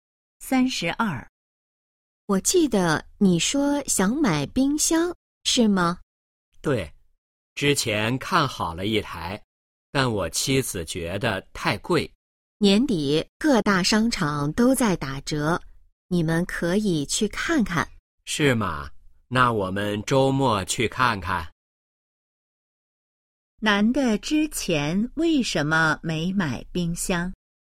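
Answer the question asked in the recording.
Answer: 妻子觉得太贵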